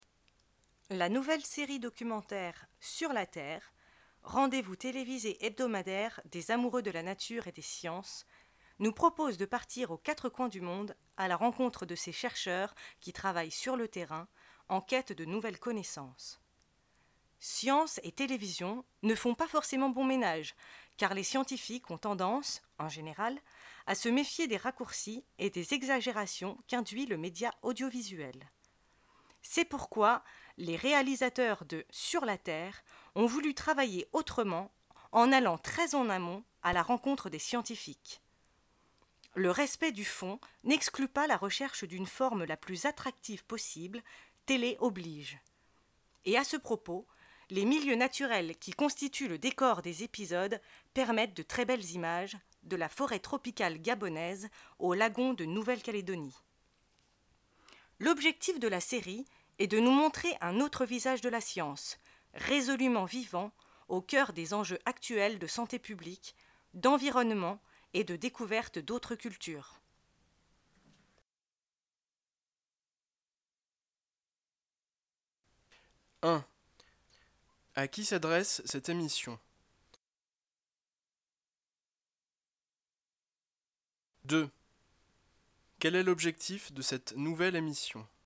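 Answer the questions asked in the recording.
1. Aux amoureux de la nature et des sciences
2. Montrer un autre visage de la science, vivant, au cœur des enjeux actuels (santé publique, environnement, découverte d'autres cultures)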